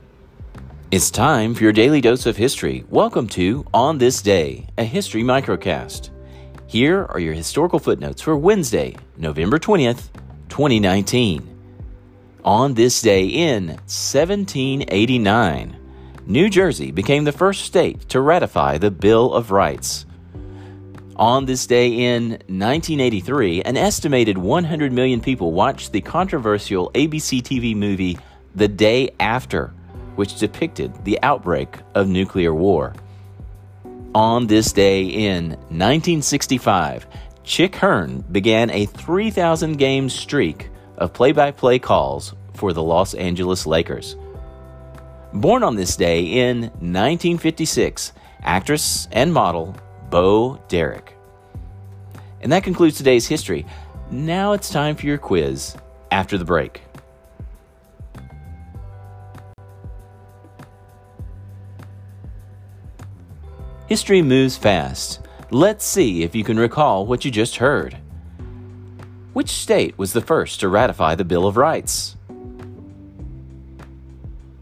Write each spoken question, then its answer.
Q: Which state was the first to ratify the Bill of Rights?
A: New Jersey.